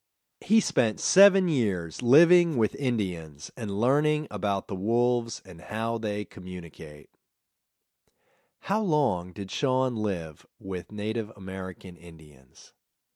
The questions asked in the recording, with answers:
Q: How long did Sean live with Native American Indians?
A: He lived with them for 7 years.